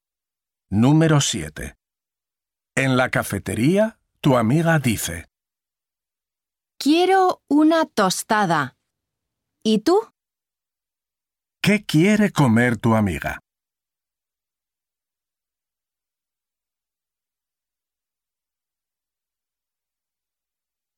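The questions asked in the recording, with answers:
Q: ¿Qué quiere comer tu amiga?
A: Una tostada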